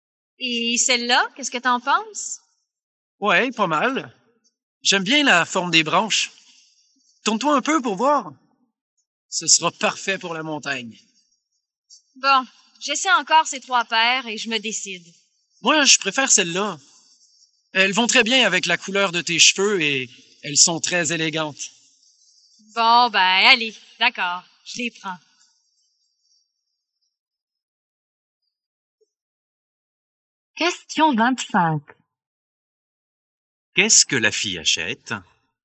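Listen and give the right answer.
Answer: des lunettes de soleil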